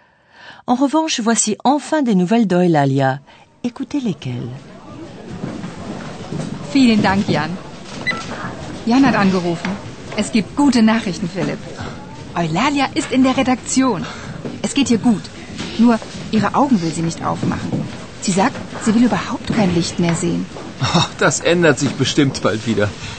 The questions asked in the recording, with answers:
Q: En revanche, voici enfin des nouvelles Alia.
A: Eulalia ne veut donc plus ouvrir les yeux pour ne plus être éblouie par la lumière.